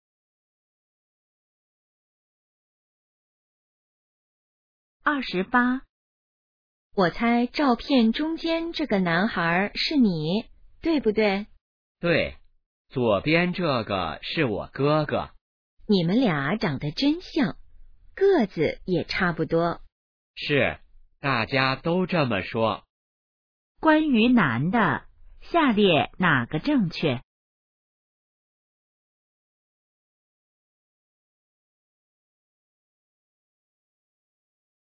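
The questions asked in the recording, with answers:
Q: 关于男的,下列哪个正确?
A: 和哥哥长得很像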